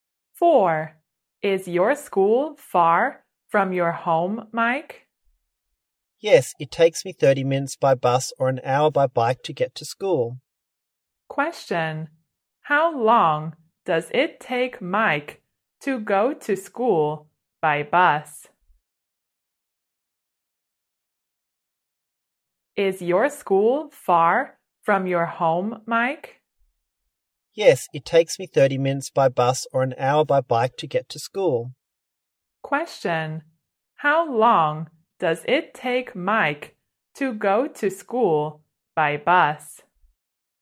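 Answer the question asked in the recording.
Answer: 30 minutes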